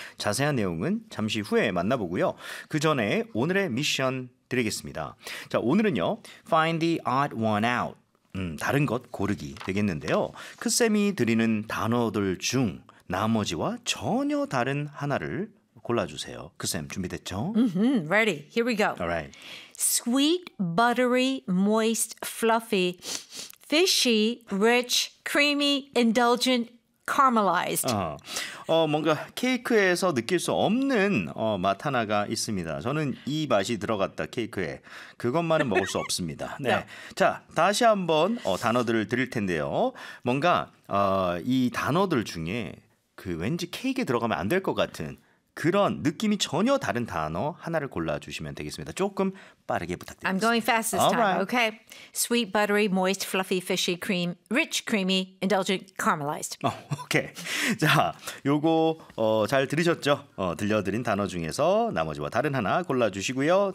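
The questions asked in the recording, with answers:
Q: 크쌤이 드리는 단어들 중 나머지와 전혀 다른 하나를 골라주세요.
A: Fishy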